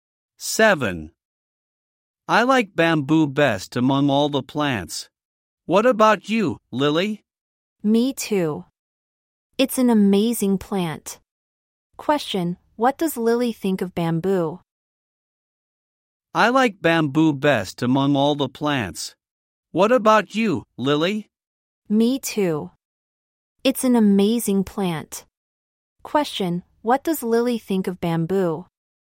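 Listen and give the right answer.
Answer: It's an amazing plant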